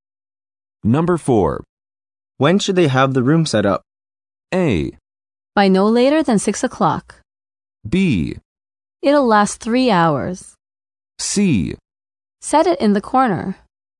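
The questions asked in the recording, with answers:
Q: When should they have the room set up?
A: A: By no later than 6 o'clock.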